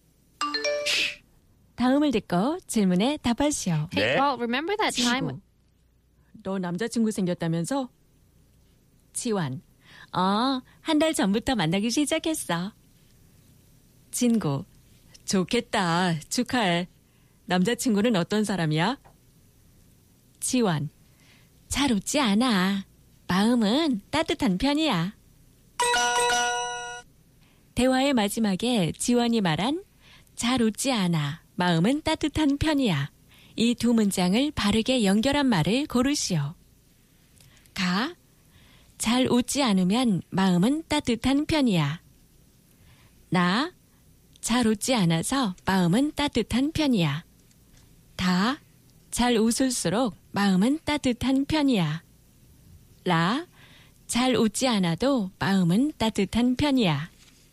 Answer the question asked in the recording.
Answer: La, although he doesn't laugh much, he has a warm heart.